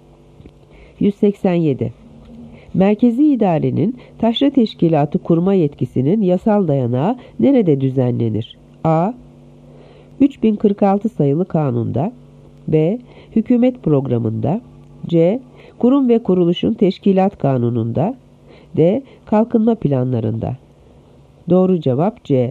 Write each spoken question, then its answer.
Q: Merkezi idarenin taşra teşkilatı kurma yetkisinin yasal dayanağı nerede düzenlenir?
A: Doğru cevap C. Kurum ve kuruluşun teşkilat kanununda.